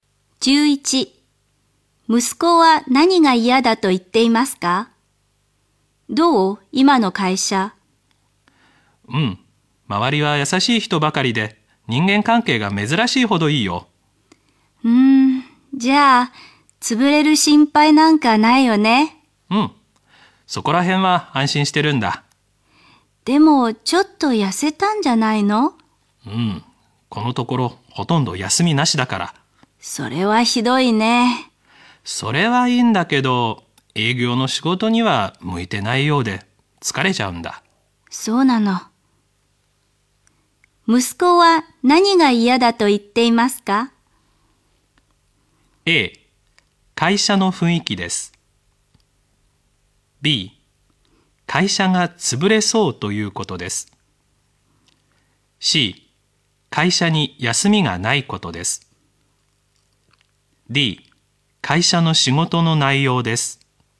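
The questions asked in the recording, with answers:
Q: 息子は何が嫌だと言っていますか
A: D: 会社の仕事の内容です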